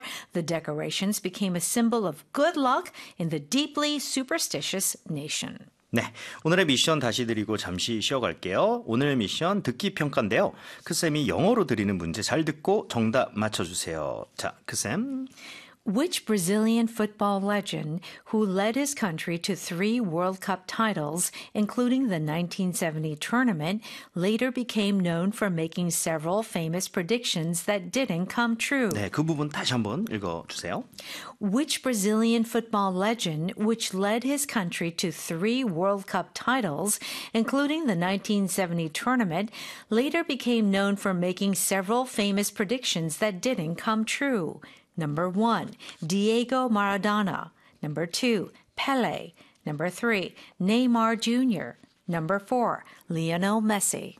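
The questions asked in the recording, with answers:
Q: Which Brazilian football legend who led his country to three World Cup titles, including the 1970 tournament, later became known for making several famous predictions that didn't come true?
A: 2: Pele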